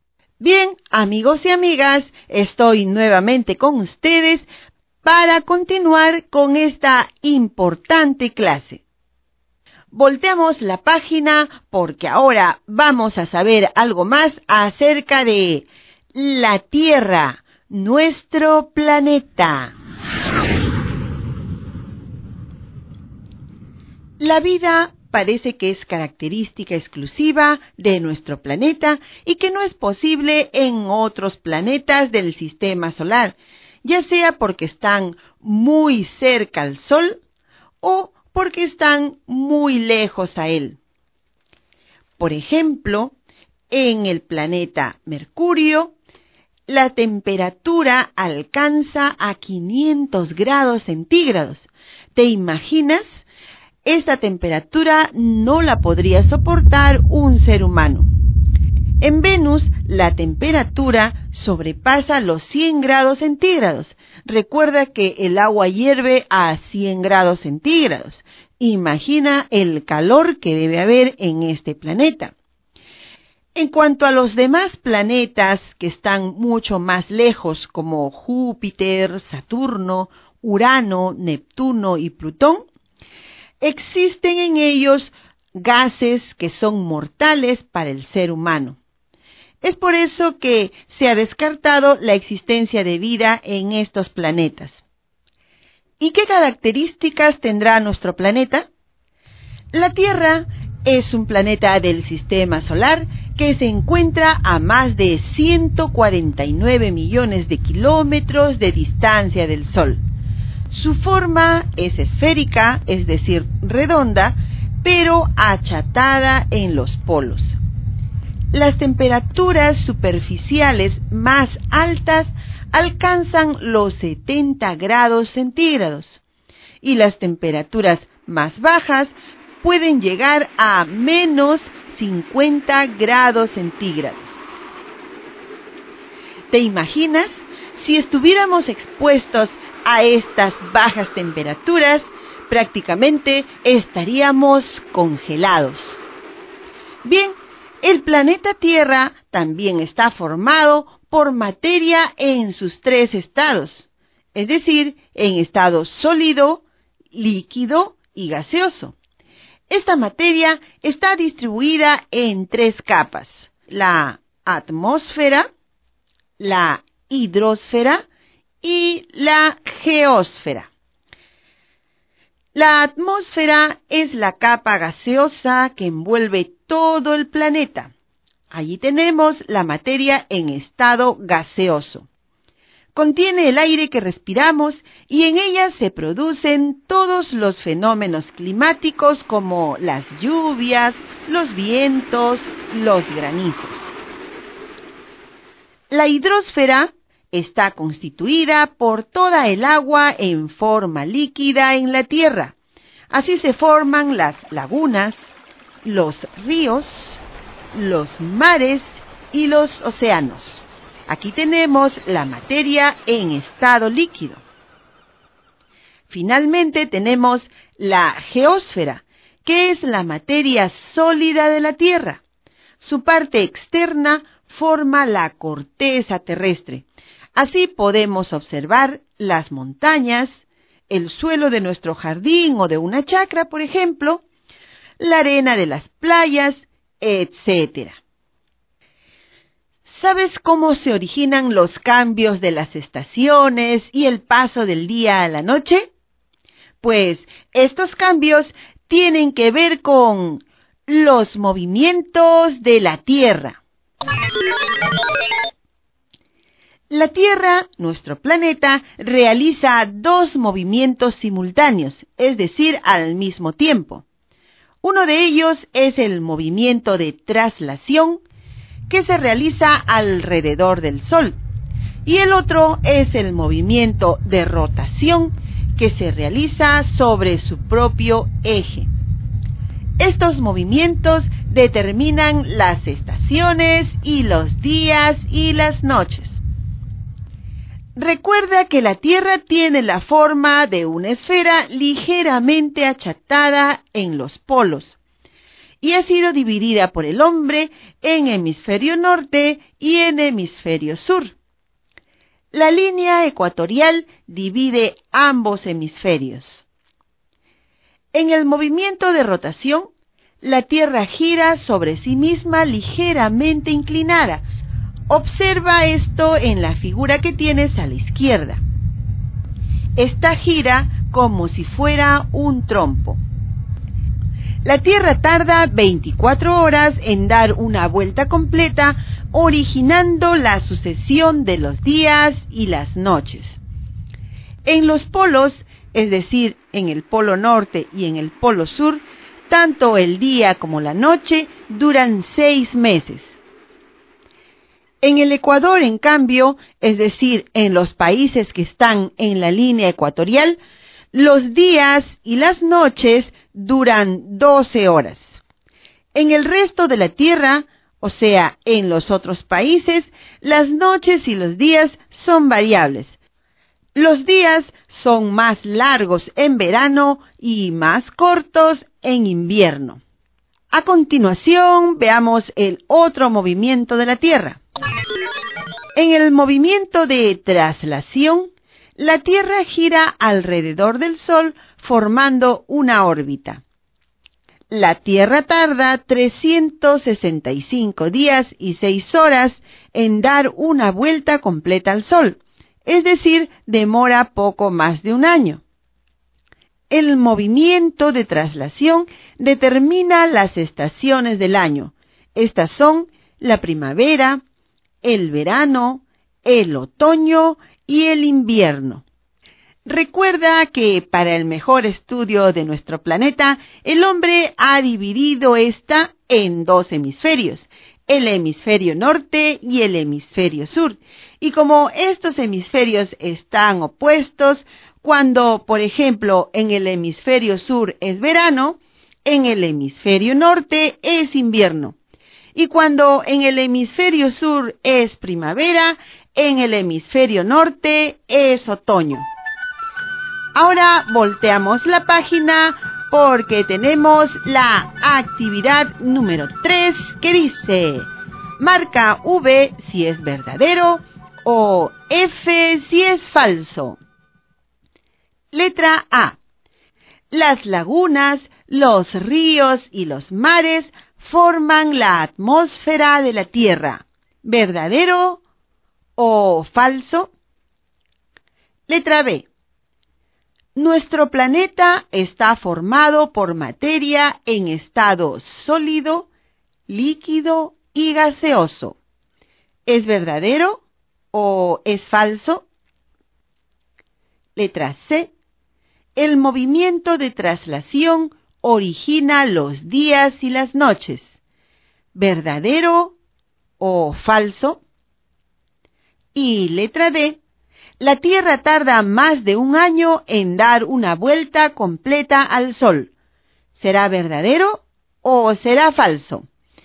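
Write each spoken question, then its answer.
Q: Letra A. Las lagunas, los ríos y los mares forman la atmósfera de la Tierra. ¿Verdadero o falso?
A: Falso

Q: Nuestro planeta está formado por materia en estado sólido, líquido y gaseoso. ¿Es verdadero o es falso?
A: Verdadero

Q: Letra C. El movimiento de traslación origina los días y las noches. ¿Verdadero o falso?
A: Falso

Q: La Tierra tarda más de un año en dar una vuelta completa al Sol. ¿Será verdadero o será falso?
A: Verdadero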